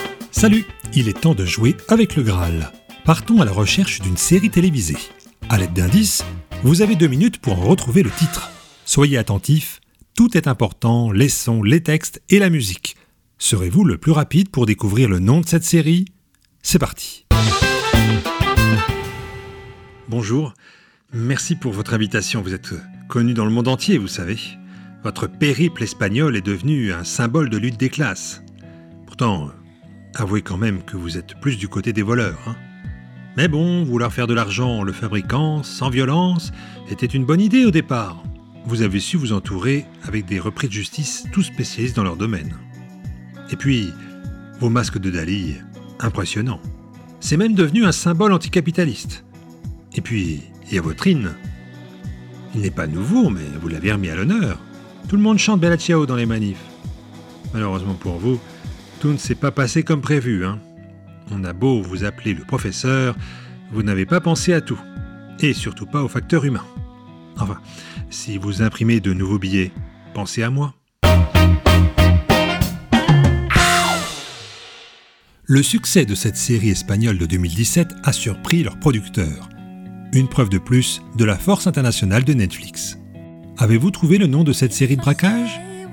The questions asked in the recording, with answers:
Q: Avez-vous trouvé le nom de cette série de braquage ?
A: Il s'agissait de la Casa de Papel.